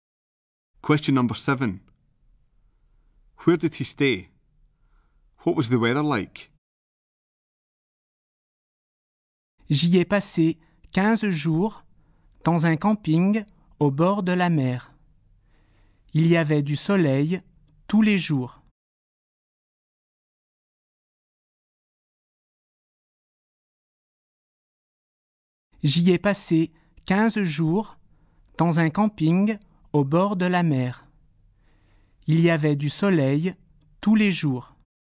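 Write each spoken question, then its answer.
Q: Where did he stay?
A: At a campsite by the sea

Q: What was the weather like?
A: Sunny every day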